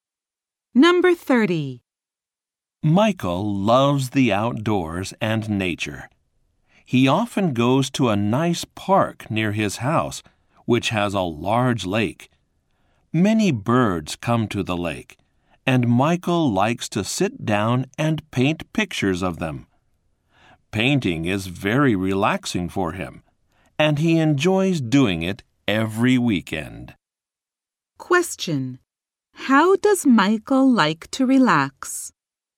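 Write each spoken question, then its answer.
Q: How does Michael like to relax?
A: By painting pictures of birds at the lake.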